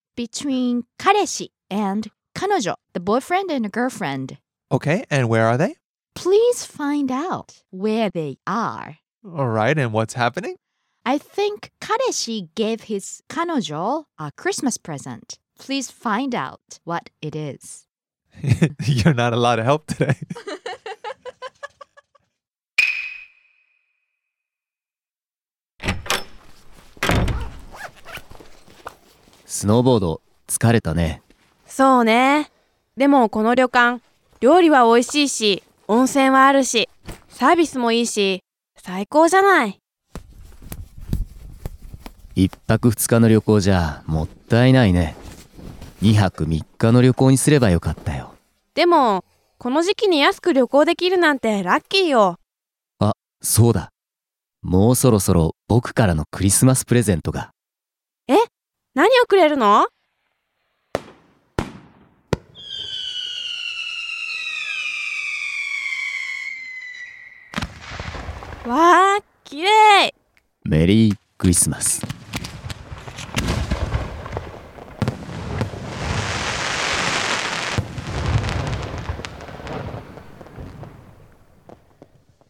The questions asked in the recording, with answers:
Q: Please find out where they are.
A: スキーリゾートの旅館にいます。